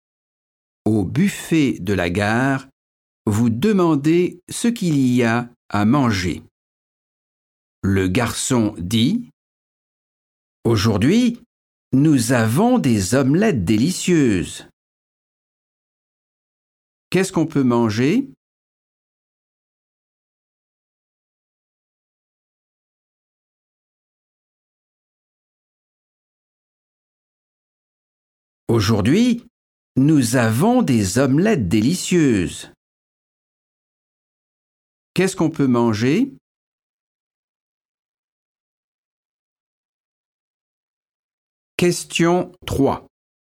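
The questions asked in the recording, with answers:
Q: Qu'est-ce qu'on peut manger?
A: des omelettes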